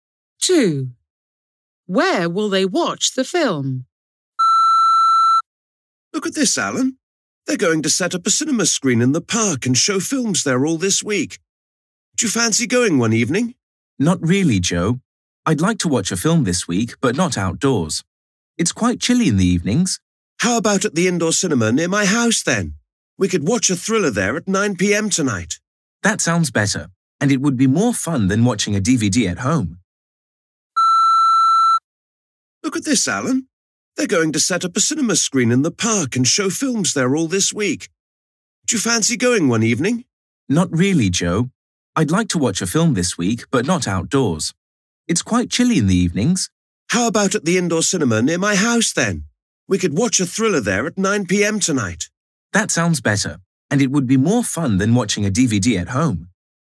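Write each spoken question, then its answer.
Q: Where will they watch the film?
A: at the indoor cinema near Joe's house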